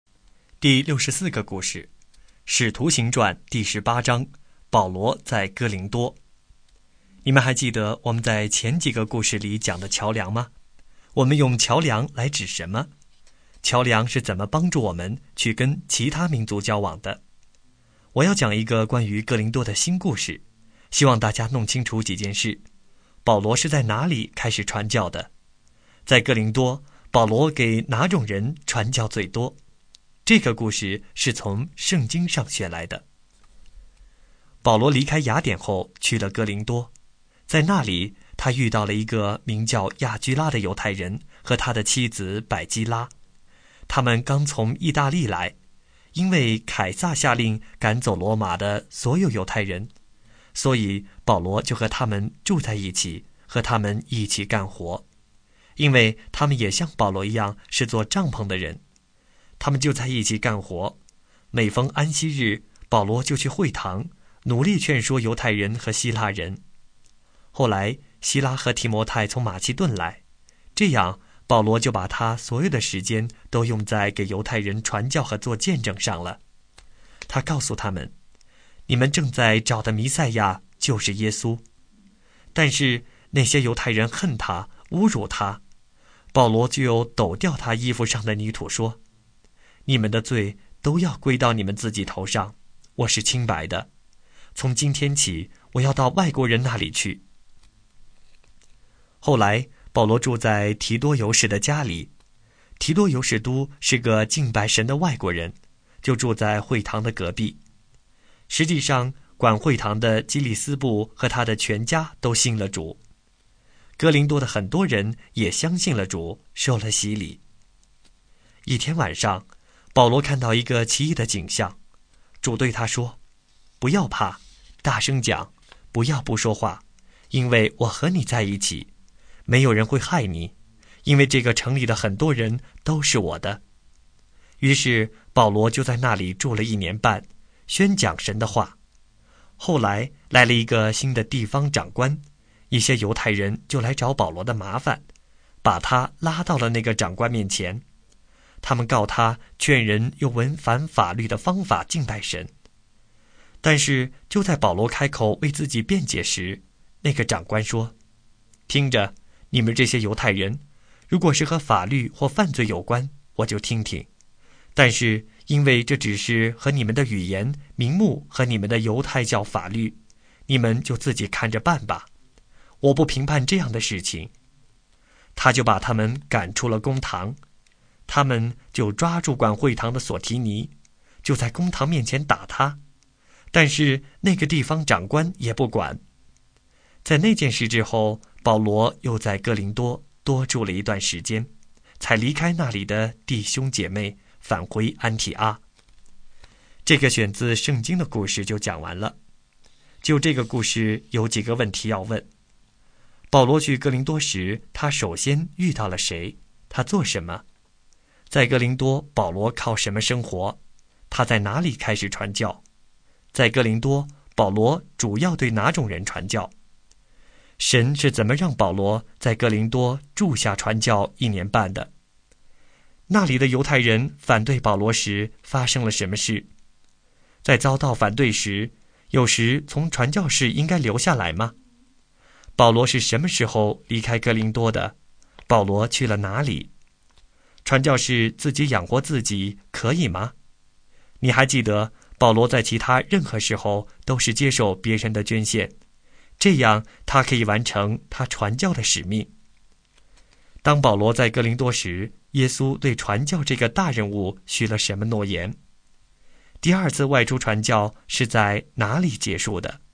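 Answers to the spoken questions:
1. 犹太人亚居拉和他的妻子百基拉
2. 做帐篷
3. 在会堂
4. 外国人(外邦人)
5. 主在异象中对他说不要怕,我与你同在,没有人会害你,这城里很多人是我的
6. 保罗抖掉衣服上的泥土,说从今天起要到外国人那里去
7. 安提阿
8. 我和你在一起,没有人会害你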